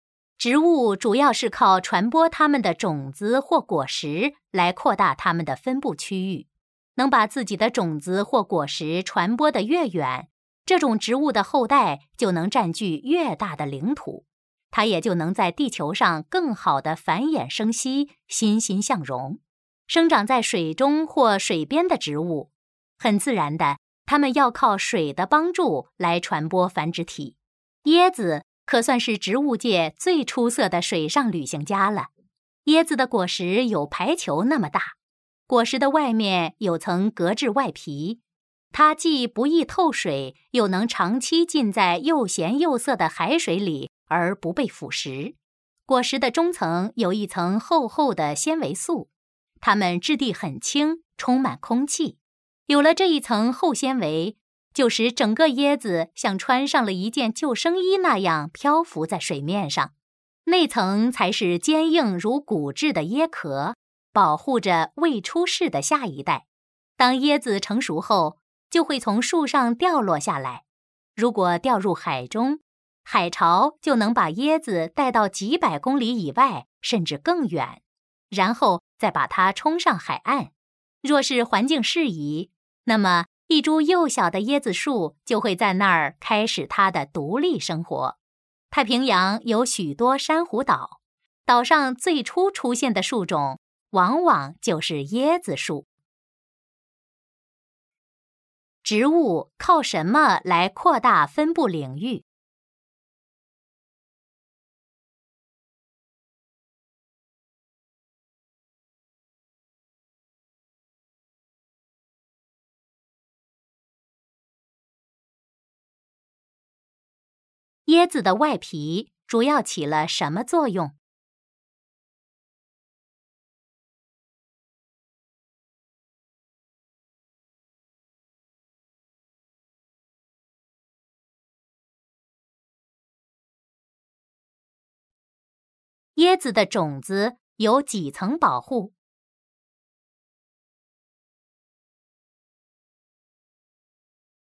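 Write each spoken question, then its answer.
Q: 植物靠什么来扩大分布领域?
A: 靠传播它们的种子或果实

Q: 椰子的外皮主要起了什么作用?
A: 不易透水,能长期浸在海水里而不被腐蚀

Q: 椰子的种子有几层保护?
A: 三层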